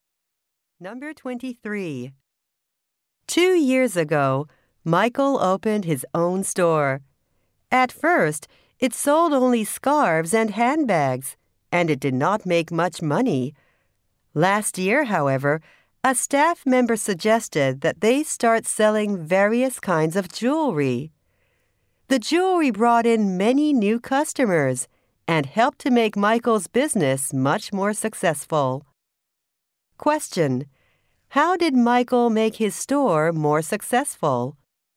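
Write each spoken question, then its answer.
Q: Question: How did Michael make his store more successful?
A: He started selling jewelry.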